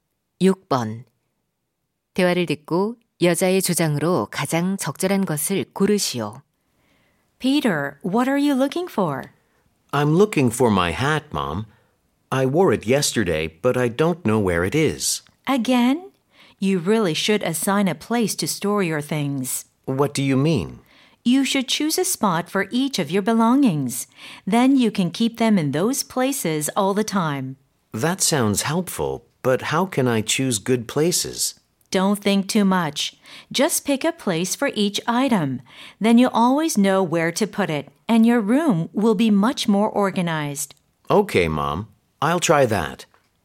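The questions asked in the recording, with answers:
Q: 대화를 듣고 여자의 주장으로 가장 적절한 것을 고르시오.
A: 물건마다 보관 장소를 정해 두어야 한다.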